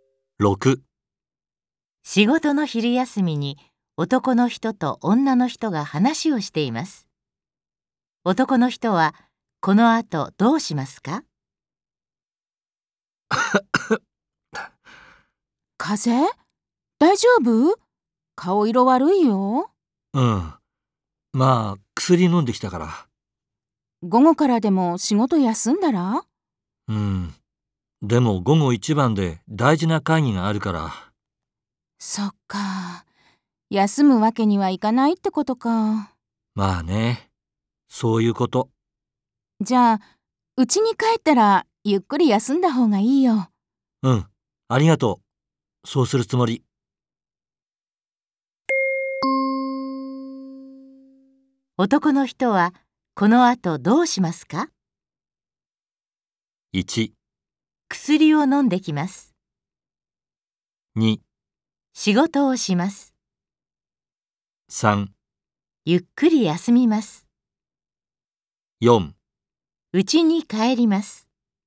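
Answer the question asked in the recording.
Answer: 2: 仕事をします。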